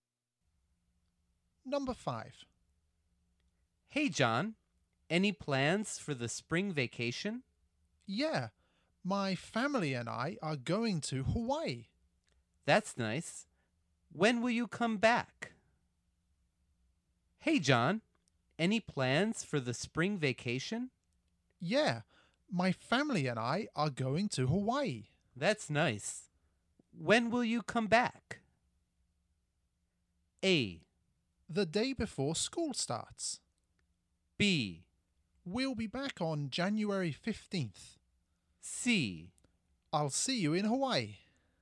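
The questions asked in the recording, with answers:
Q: That's nice. When will you come back?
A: A: The day before school starts.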